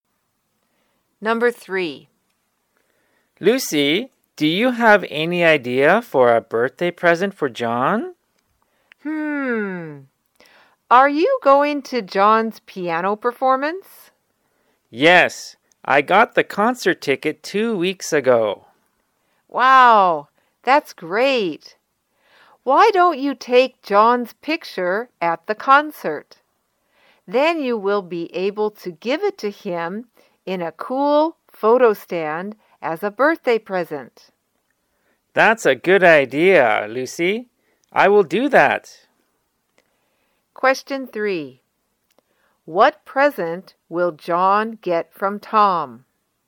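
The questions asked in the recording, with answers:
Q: What present will John get from Tom?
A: A picture of John at his concert in a photo stand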